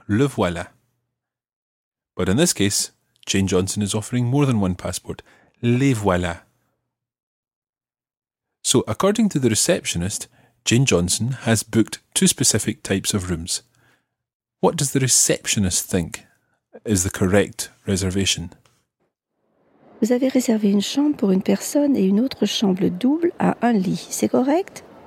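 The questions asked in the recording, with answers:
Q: What does the receptionist think is the correct reservation?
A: A single room and a double room with one bed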